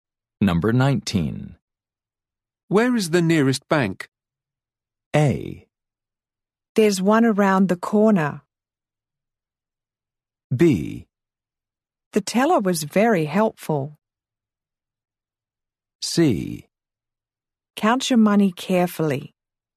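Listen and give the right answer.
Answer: A: There's one around the corner.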